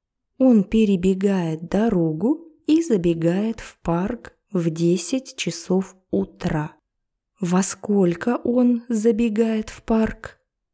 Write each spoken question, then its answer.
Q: Во сколько он забегает в парк?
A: В 10 утра.